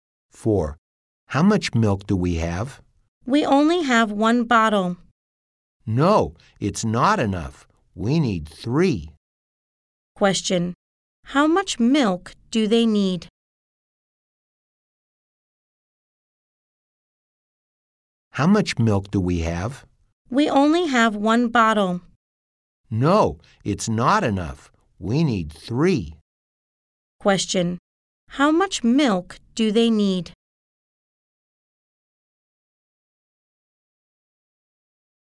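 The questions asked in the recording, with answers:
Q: How much milk do they need?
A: 3 bottles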